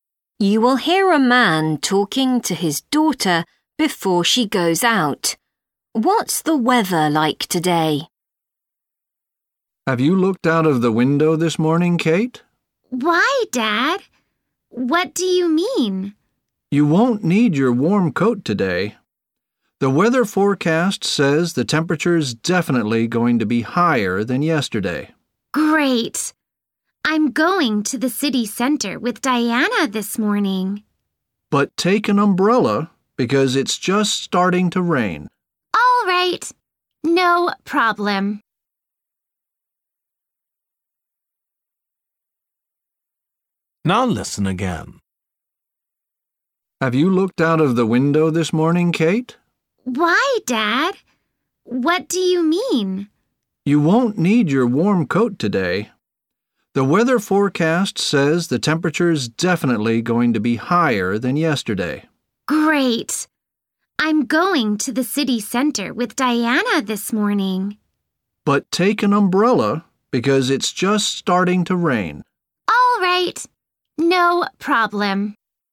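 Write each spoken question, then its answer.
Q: What's the weather like today?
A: Warmer than yesterday, and starting to rain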